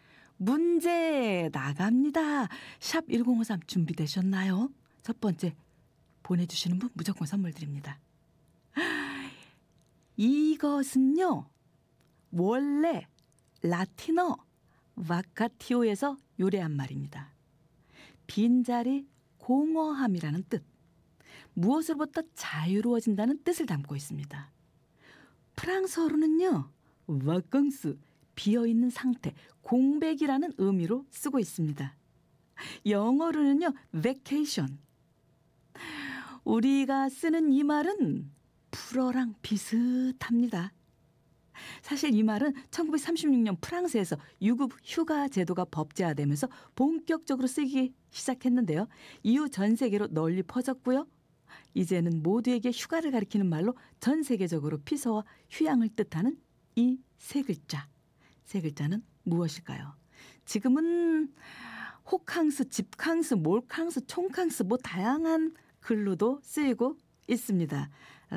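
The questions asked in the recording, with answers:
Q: 세 글자는 무엇일까요?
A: 바캉스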